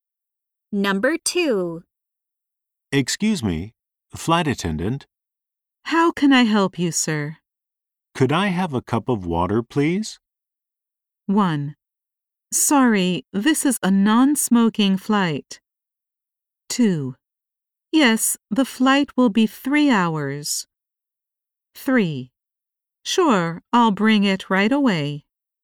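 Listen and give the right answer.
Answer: 3: Sure, I'll bring it right away.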